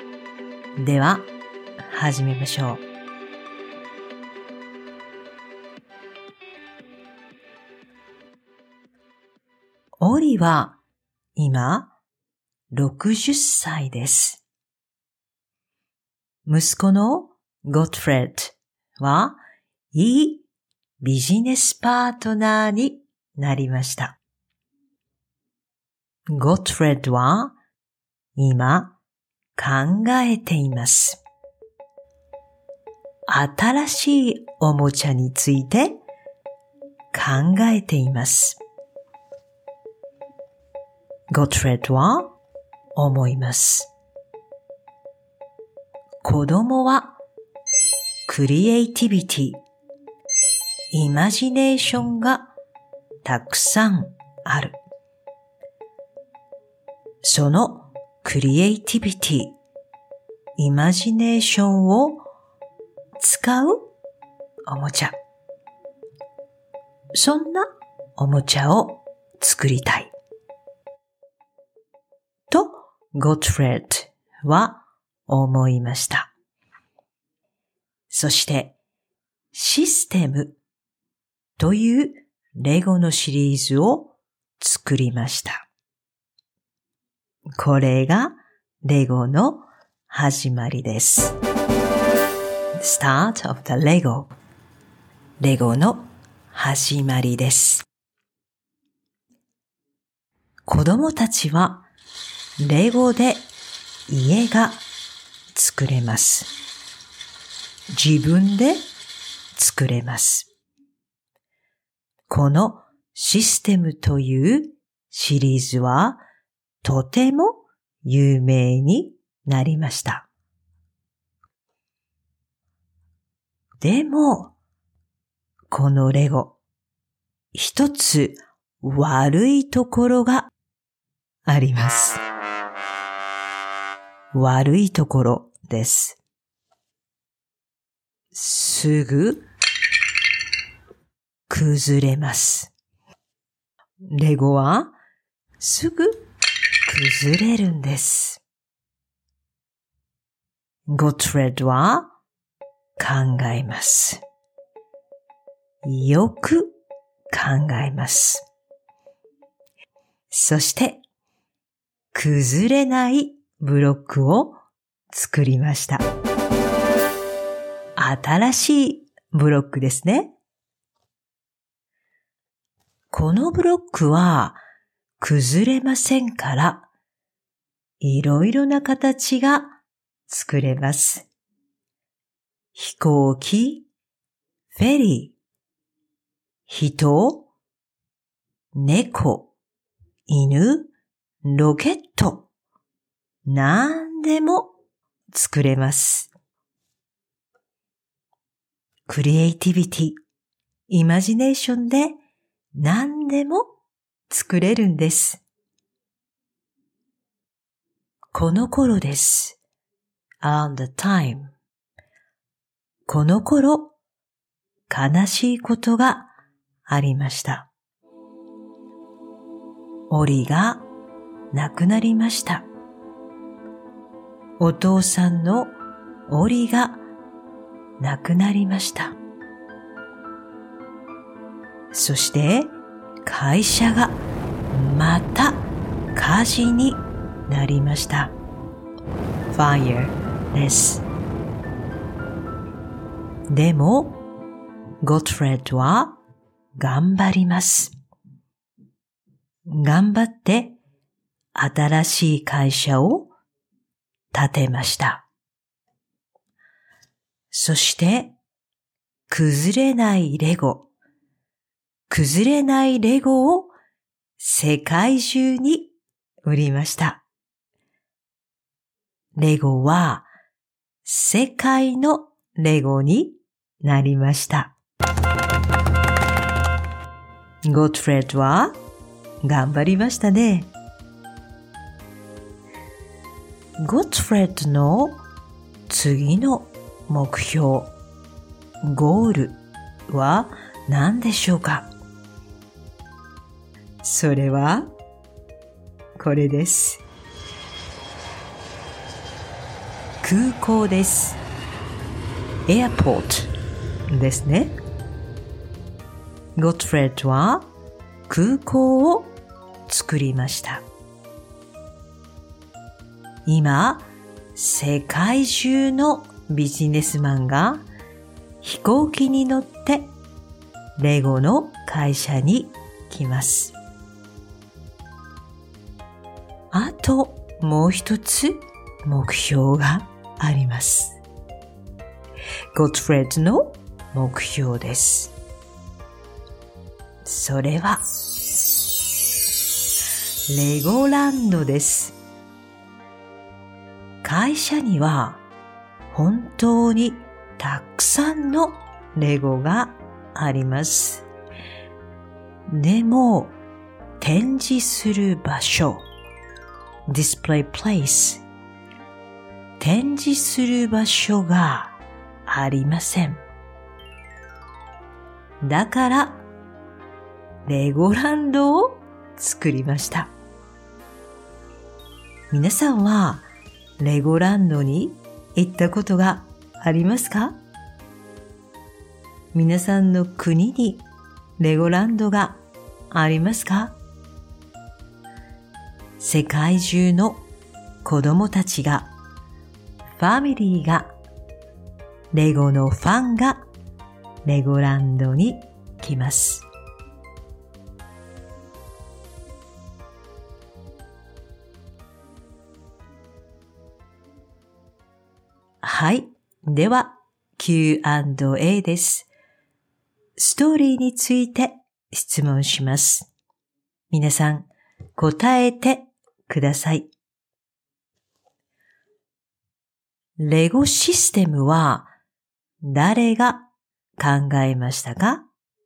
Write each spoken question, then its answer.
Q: レゴシステムは誰が考えましたか?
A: ゴットフレッドが考えました。